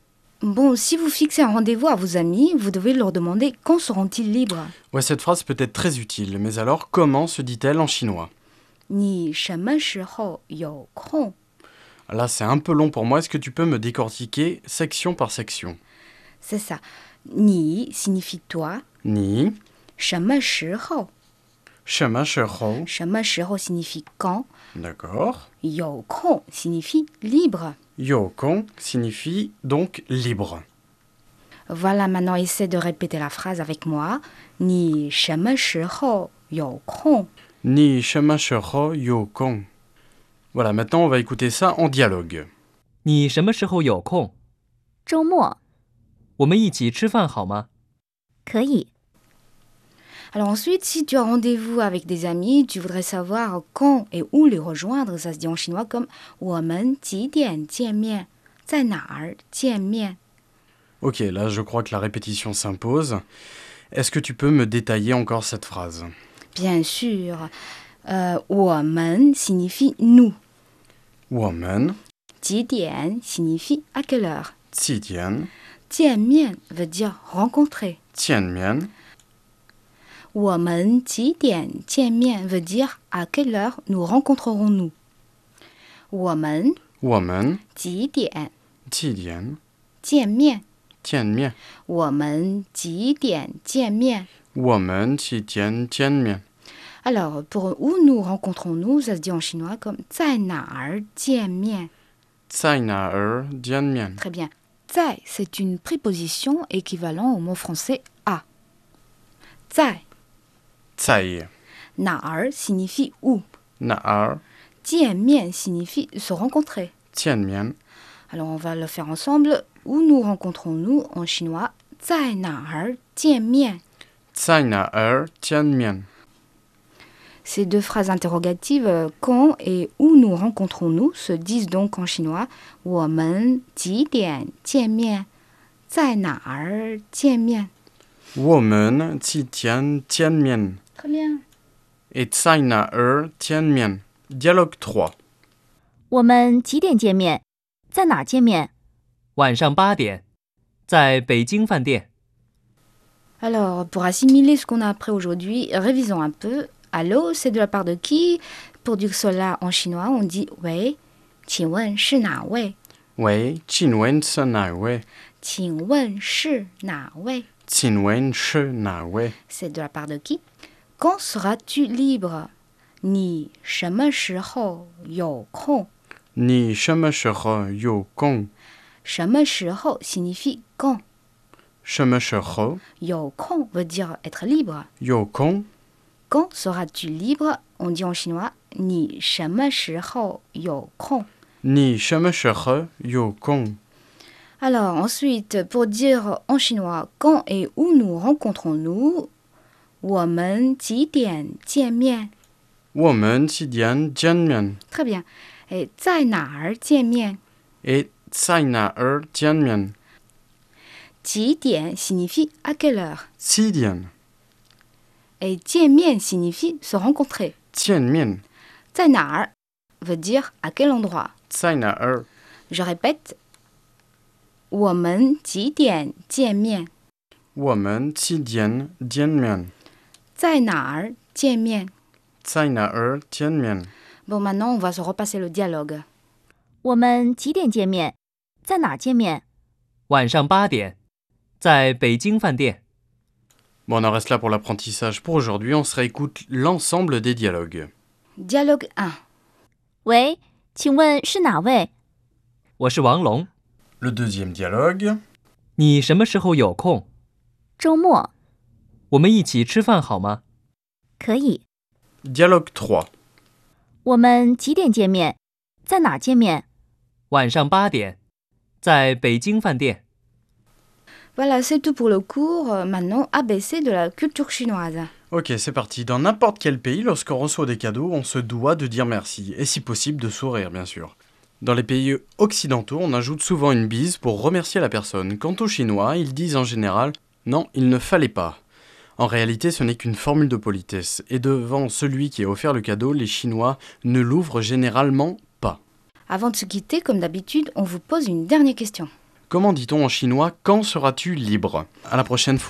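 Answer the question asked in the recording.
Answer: 你什么时候有空?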